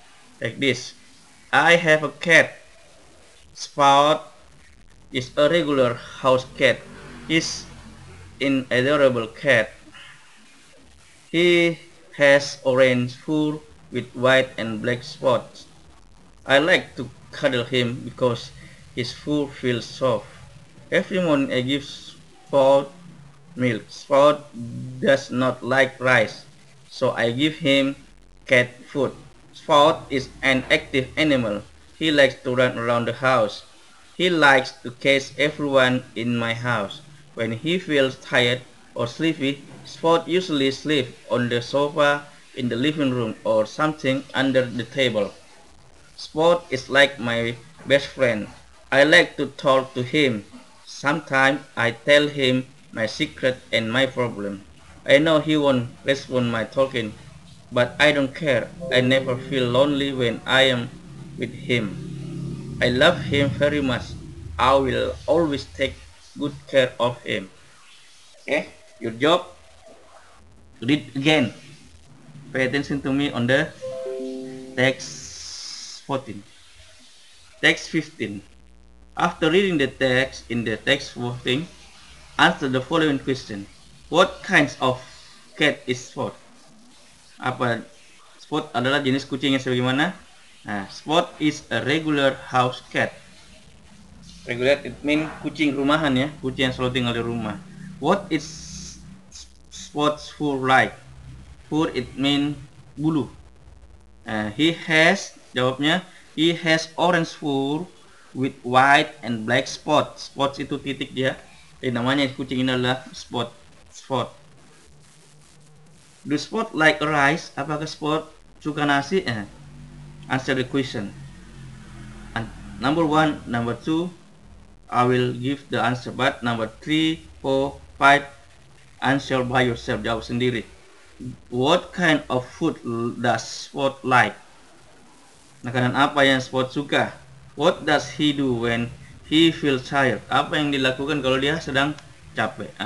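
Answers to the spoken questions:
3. No, Spot does not like rice
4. Cat food (and milk)
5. He sleeps on the sofa in the living room or under the table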